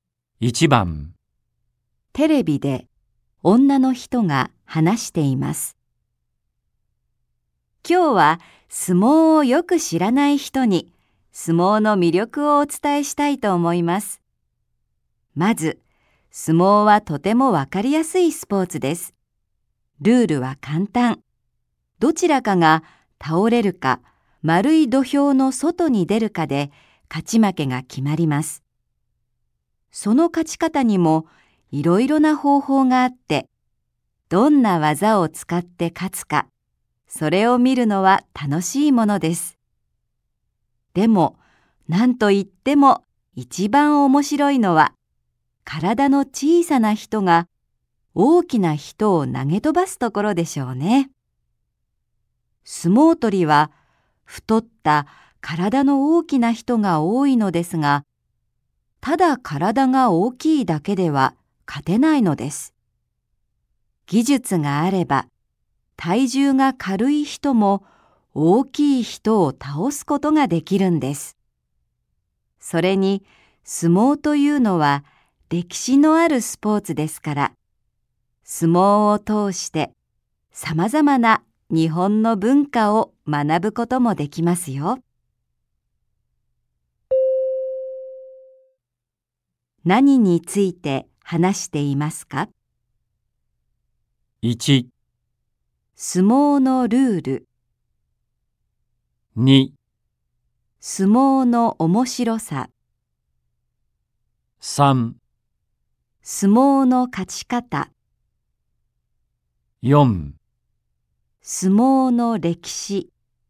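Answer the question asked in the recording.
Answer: 2: 相撲の面白さ。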